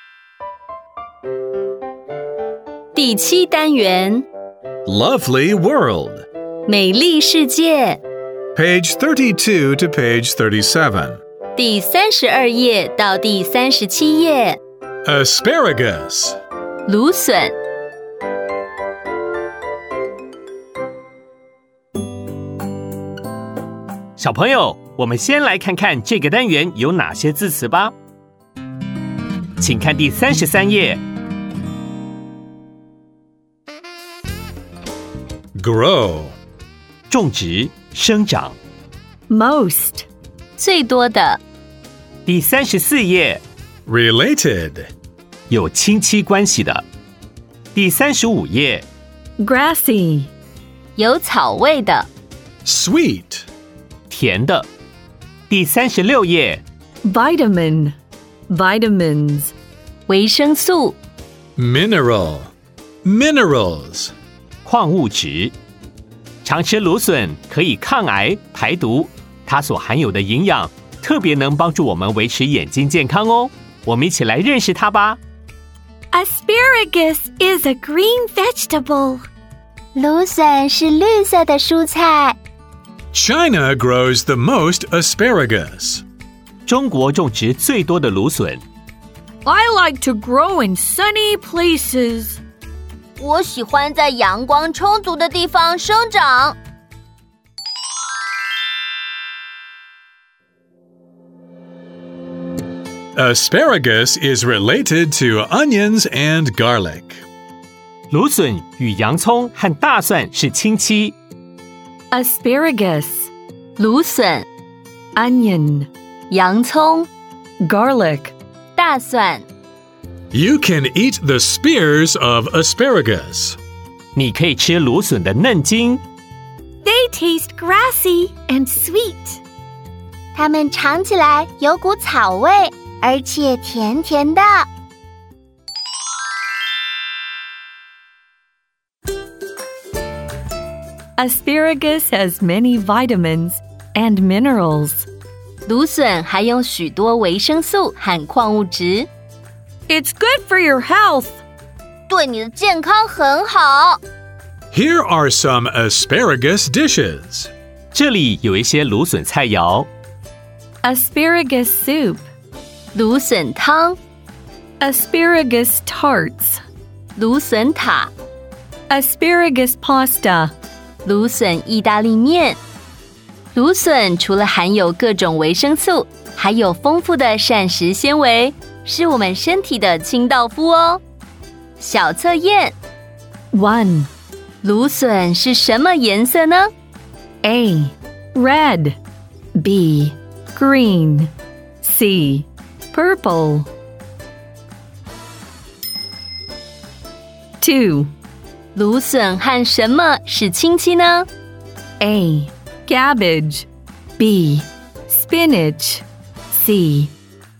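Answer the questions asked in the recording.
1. B: Green
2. C: Garlic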